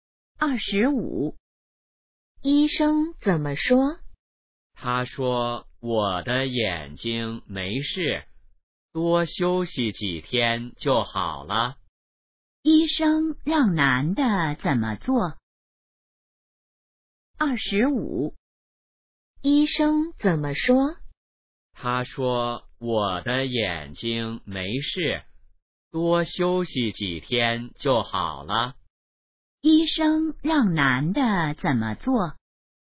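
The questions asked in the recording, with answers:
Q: 医生让男的怎么做?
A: 多休息几天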